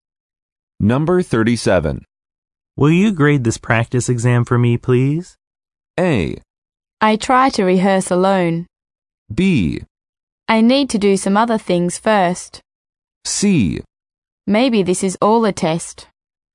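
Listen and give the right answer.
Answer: B: I need to do some other things first.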